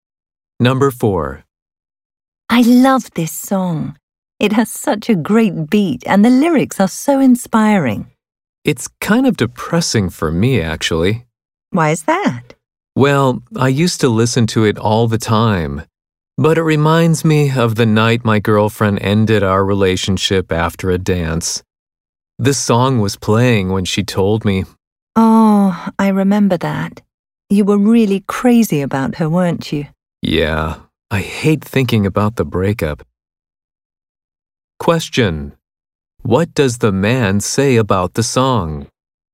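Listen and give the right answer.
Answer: It depresses him because it reminds him of when his girlfriend broke up with him.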